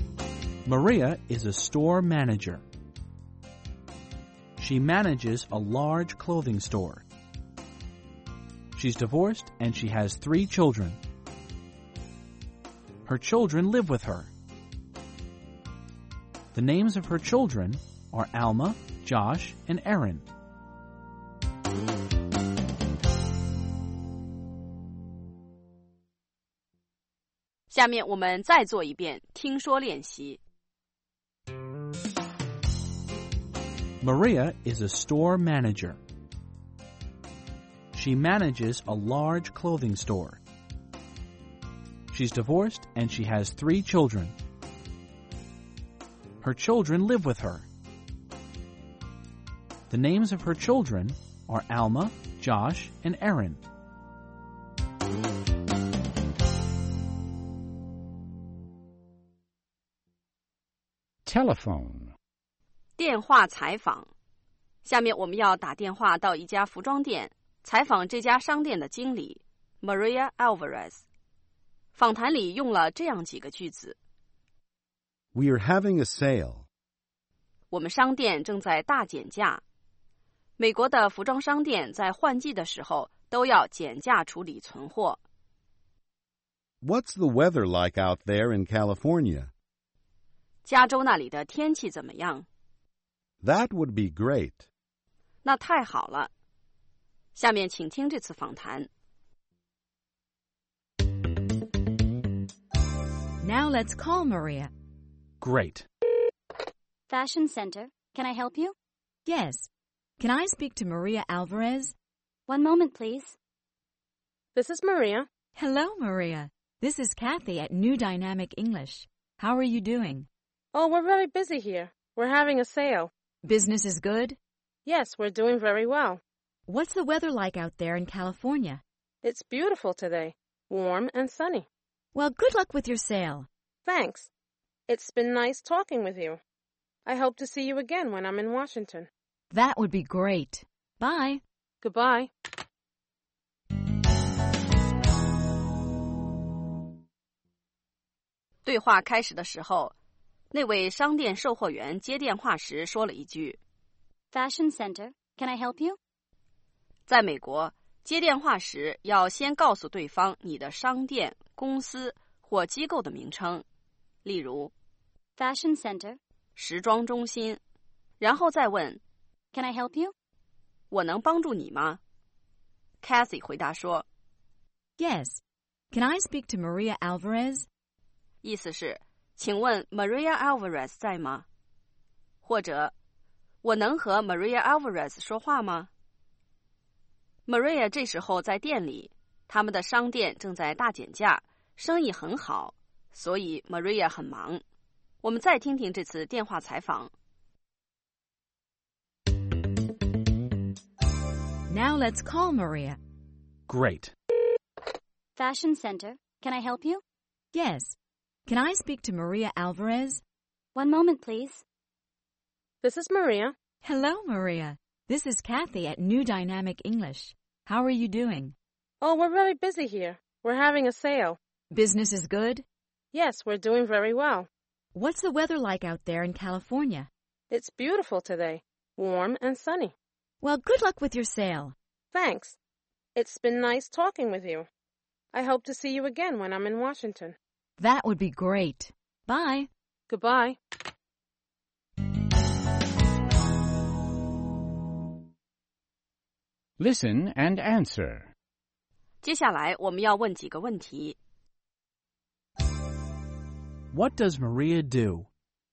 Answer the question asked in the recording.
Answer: She's a store manager.